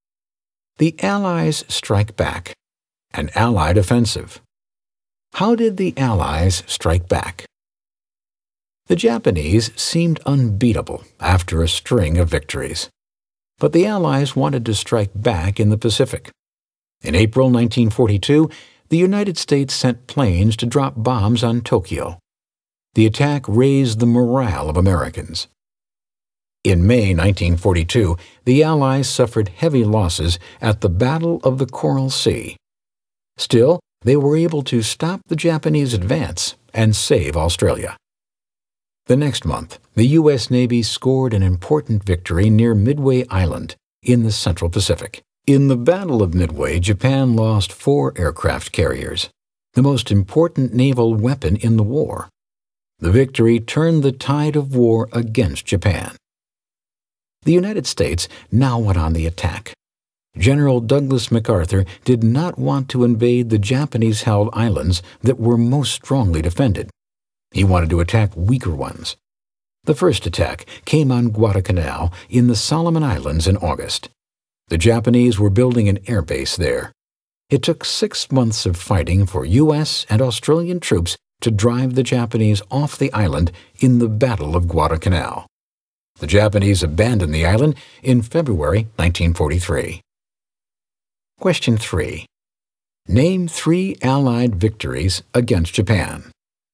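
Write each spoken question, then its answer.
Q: Name 3 Allied victories against Japan.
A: Coral Sea, Midway, Guadalcanal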